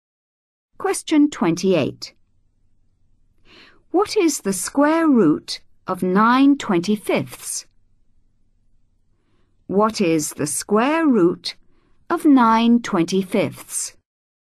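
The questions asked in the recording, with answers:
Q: What is the square root of 9/25?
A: 3/5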